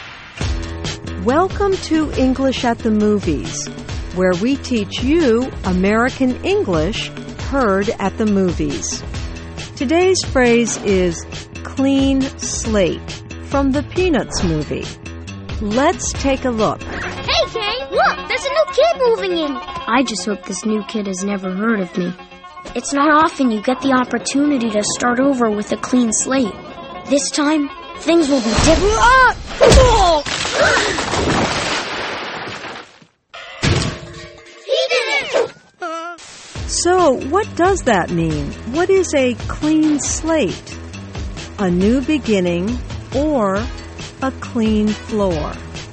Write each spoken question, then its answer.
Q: What is a clean slate?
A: A clean slate is a new beginning.